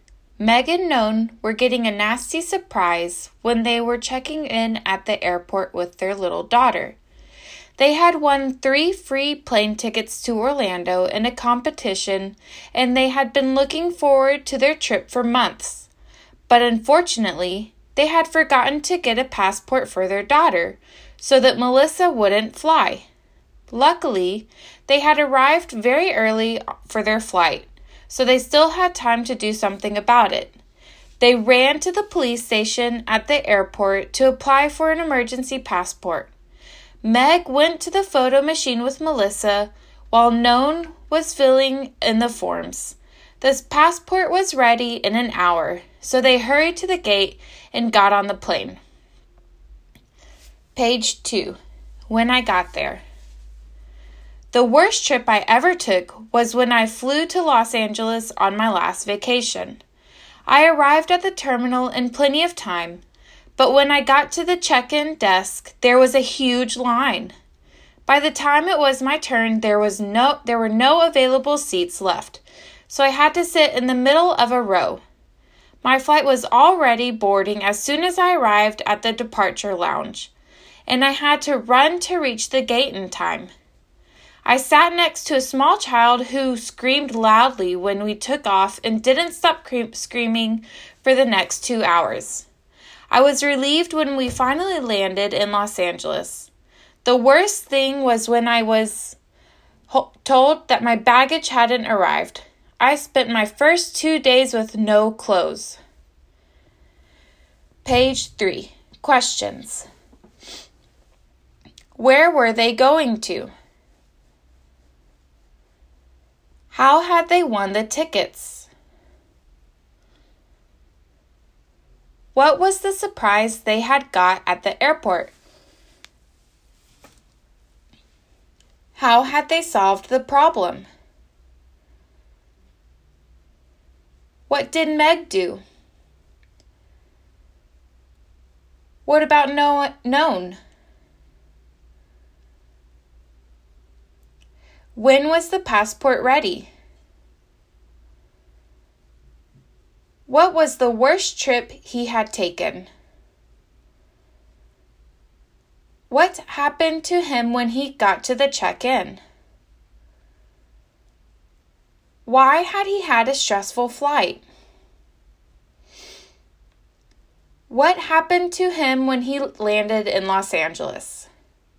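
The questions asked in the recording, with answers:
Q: Where were they going to?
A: Orlando

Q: How had they won the tickets?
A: In a competition

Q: What was the surprise they had got at the airport?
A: They had forgotten to get a passport for their daughter

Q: How had they solved the problem?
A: They applied for an emergency passport at the airport police station

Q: What did Meg do?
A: She went to the photo machine with Melissa

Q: What about Noan?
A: He filled in the forms

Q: When was the passport ready?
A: In an hour

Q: What was the worst trip he had taken?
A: When he flew to Los Angeles on his last vacation

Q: What happened to him when he got to the check-in?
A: There was a huge line and no seats left, so he sat in the middle of a row

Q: Why had he had a stressful flight?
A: A small child next to him screamed for 2 hours

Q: What happened to him when he landed in Los Angeles?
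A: His baggage hadn't arrived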